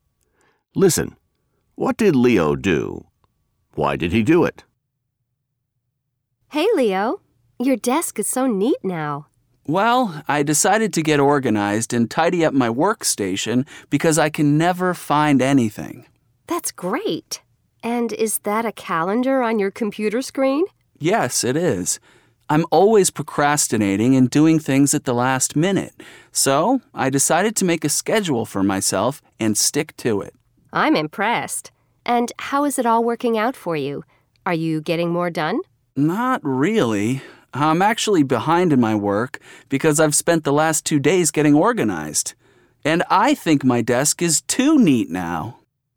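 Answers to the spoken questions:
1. He tidied up his workstation and made a schedule for himself.
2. Because he could never find anything and was always procrastinating.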